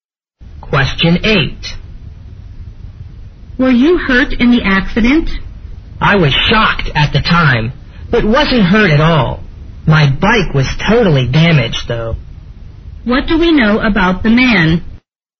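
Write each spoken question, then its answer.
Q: What do we know about the man?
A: He wasn't hurt in the accident, but his bike was totally damaged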